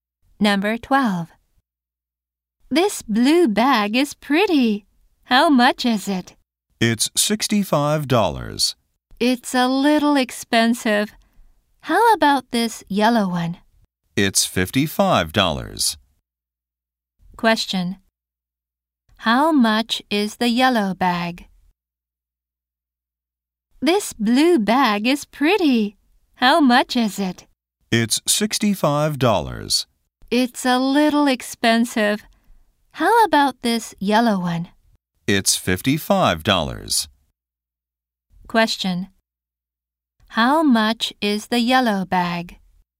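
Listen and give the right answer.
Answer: $55.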